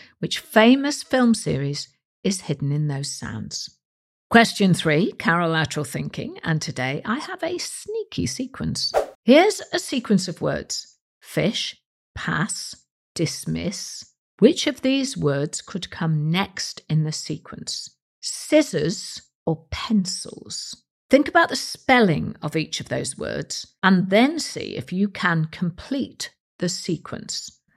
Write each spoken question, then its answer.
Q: Fish, pass, dismiss. Which of these words could come next in the sequence?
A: And the answer is scissors.